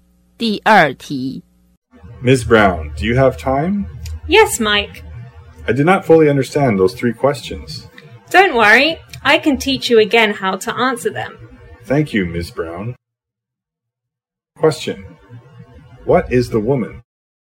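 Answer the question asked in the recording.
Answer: A teacher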